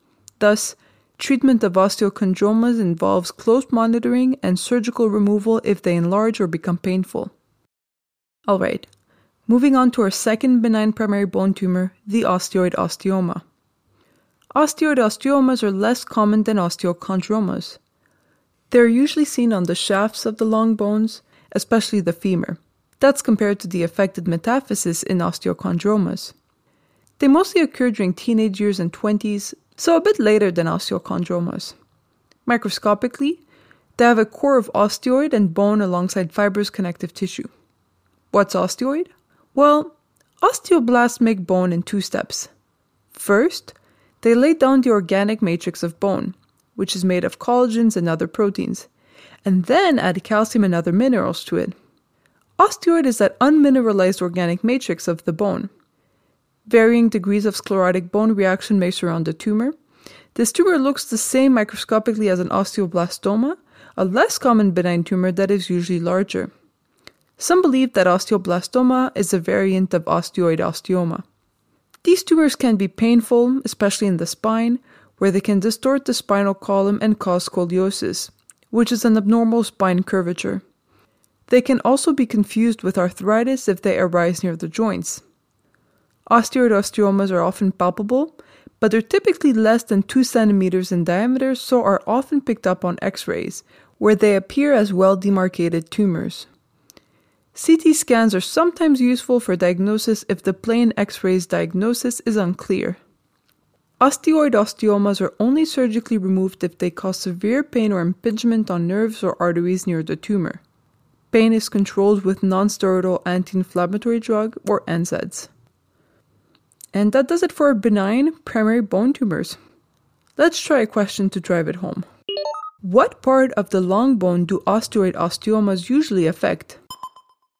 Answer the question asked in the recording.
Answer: These benign tumors usually arise in the diaphysis, or shaft, of the femur.